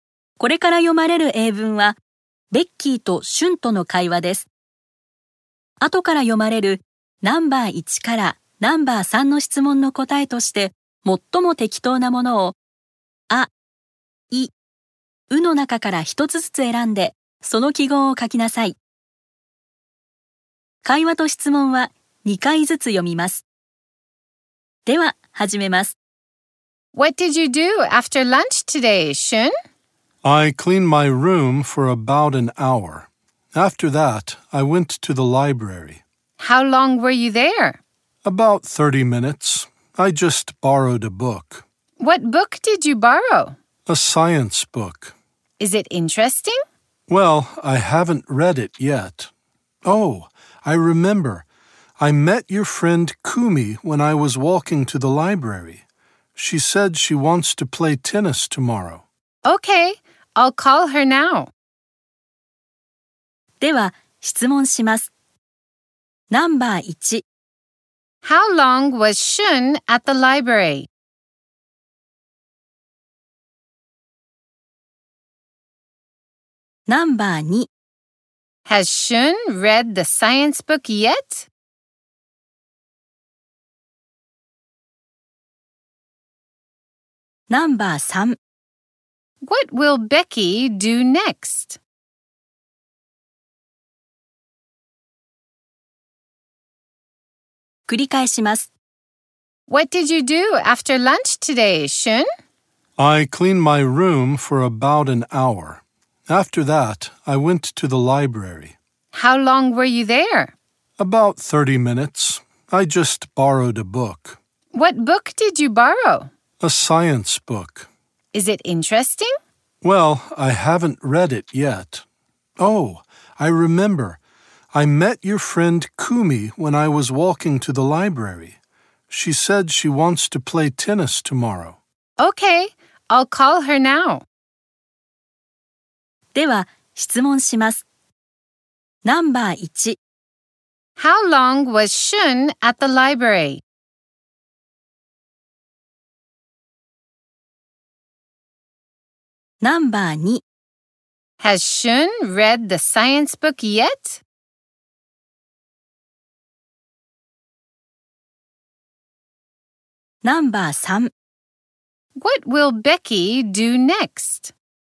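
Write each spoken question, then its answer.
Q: How long was Shun at the library?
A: About 30 minutes.

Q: Has Shun read the science book yet?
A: No, he hasn't.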